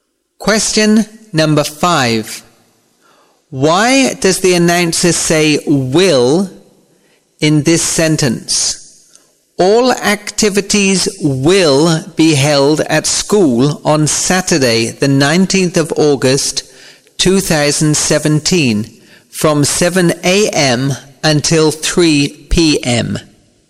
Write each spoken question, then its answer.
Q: Why does the announcer say will in this sentence?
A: To show the time reference that is in the future.